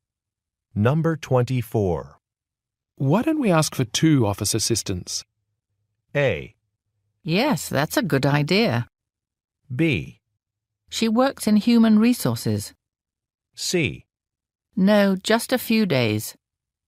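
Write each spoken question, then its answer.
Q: Why don't we ask for two office assistants?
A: A: Yes, that's a good idea.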